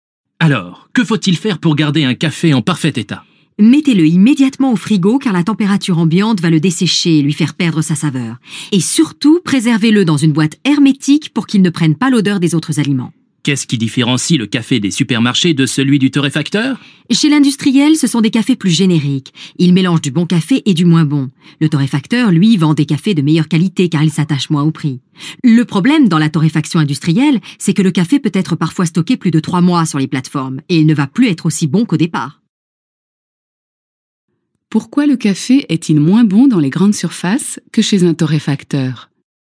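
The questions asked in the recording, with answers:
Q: Pourquoi le café est-il moins bon dans les grandes surfaces que chez un torréfacteur ?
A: Parce que c'est un café générique, un mélange de bon et de moins bon café, parfois stocké plus de 3 mois, alors que le torréfacteur s'attache moins au prix et vend un café de meilleure qualité.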